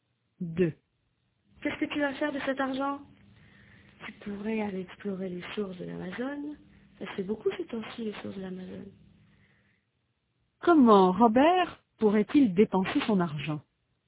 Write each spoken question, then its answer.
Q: Comment Robert pourrait-il dépenser son argent?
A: Il pourrait aller explorer les sources de l'Amazon.